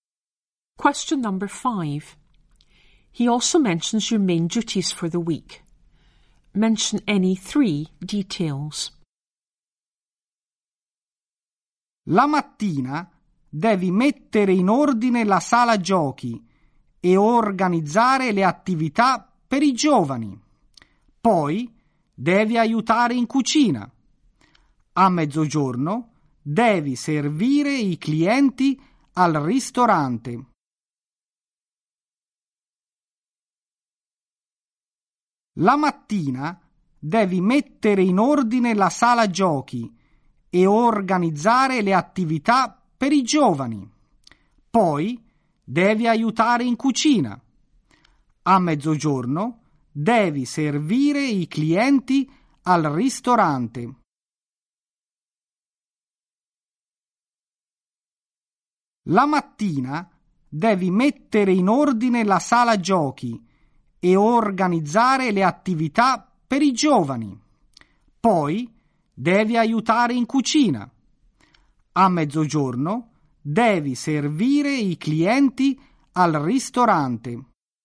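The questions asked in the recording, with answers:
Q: He also mentions your main duties for the week.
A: Tidy the games room and organise activities for young people, help in the kitchen, serve customers in the restaurant at midday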